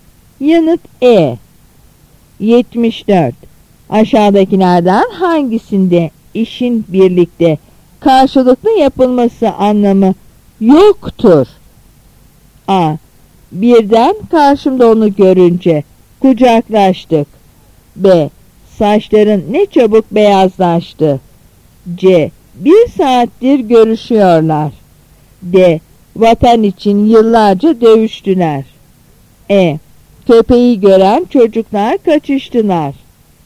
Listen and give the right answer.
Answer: Yanıt B.